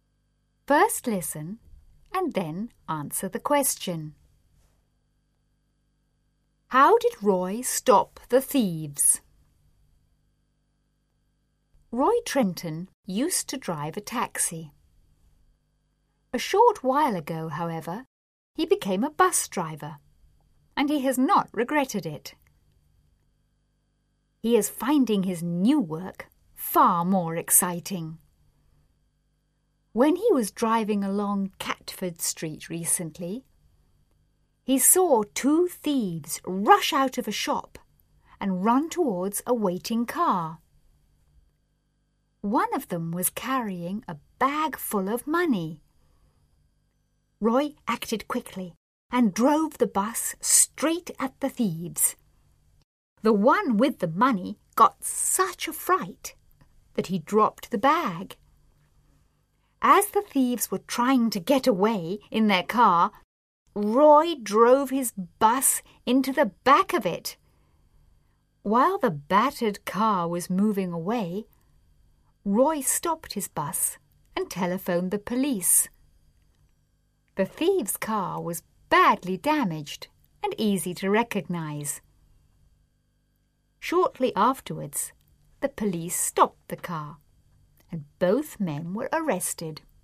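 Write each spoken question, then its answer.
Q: How did Roy stop the thieves?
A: He drove his bus straight at them and then into the back of their car.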